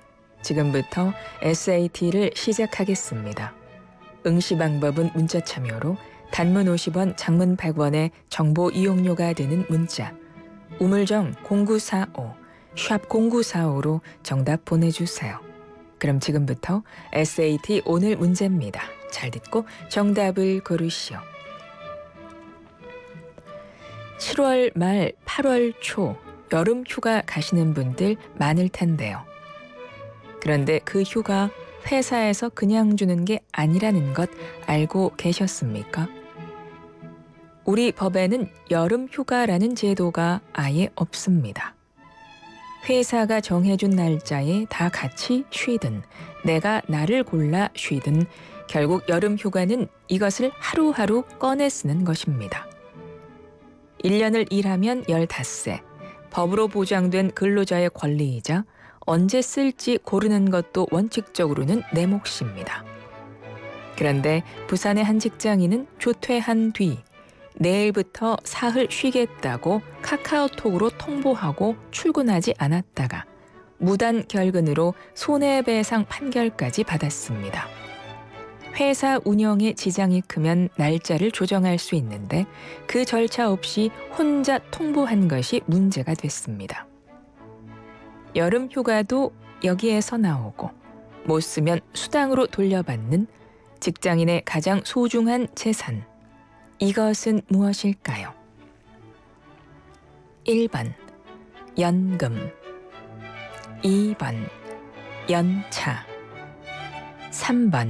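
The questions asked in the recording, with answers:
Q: 이것은 무엇일까요?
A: 2: 연차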